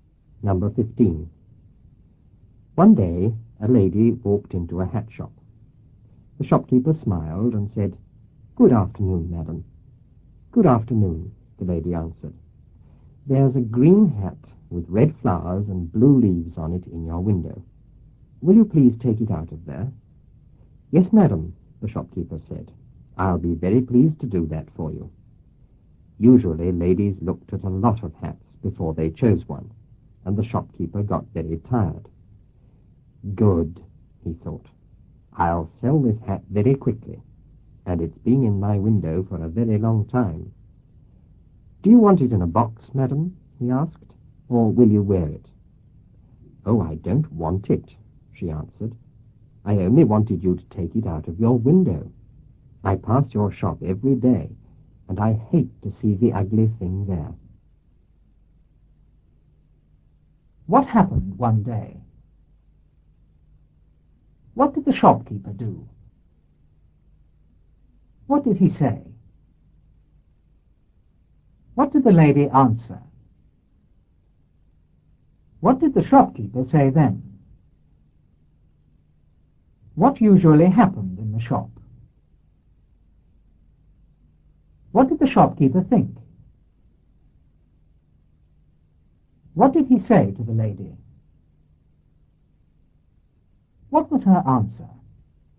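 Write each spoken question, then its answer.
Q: What happened one day?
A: A lady walked into a hat shop.

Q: What did the shopkeeper do?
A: He smiled and said good afternoon.

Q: What did he say?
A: "Good afternoon, madam."

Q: What did the shopkeeper say then?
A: "Yes, madam. I'll be very pleased to do that for you."

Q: What usually happened in the shop?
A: Ladies looked at a lot of hats before choosing one, and the shopkeeper got very tired.

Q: What did the shopkeeper think?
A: He would sell this hat very quickly; it had been in the window a long time.

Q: What did he say to the lady?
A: "Do you want it in a box, madam, or will you wear it?"

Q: What was her answer?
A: She didn't want it; she only wanted it out of the window because she hated seeing the ugly thing every day.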